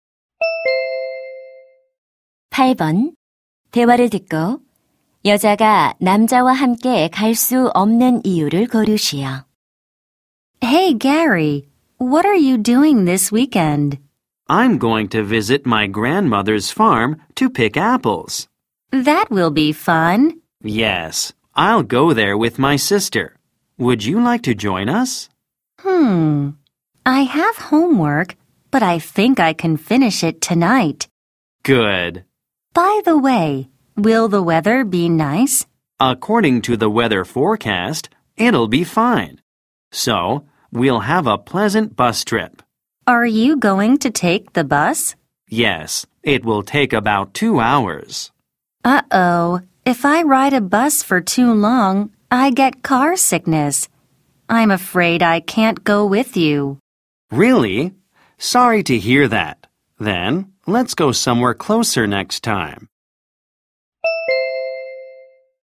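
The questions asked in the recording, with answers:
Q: 대화를 듣고 여자가 남자와 함께 갈 수 없는 이유를 고르시오.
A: 오래 버스를 타면 멀미를 해서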